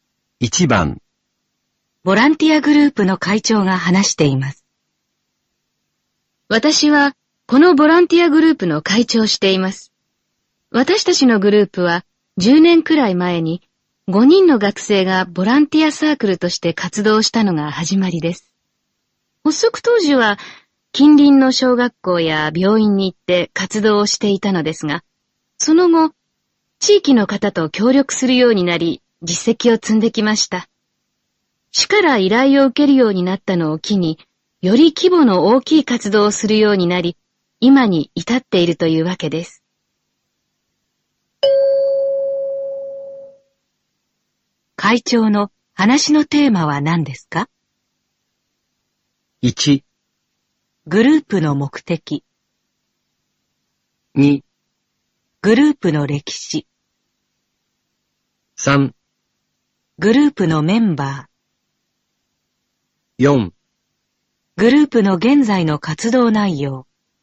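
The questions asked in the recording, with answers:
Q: 会長の話のテーマは何ですか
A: 2: グループの歴史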